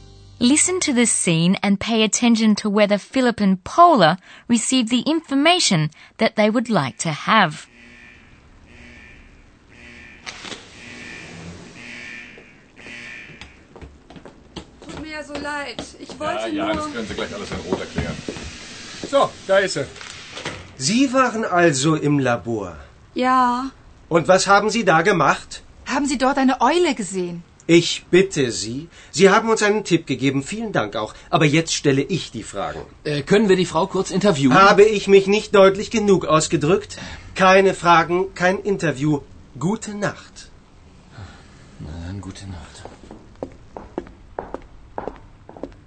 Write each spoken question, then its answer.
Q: Listen to the scene and pay attention to whether Philip and Paula received the information that they would like to have.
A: Unfortunately, Philip and Paula don't get any information.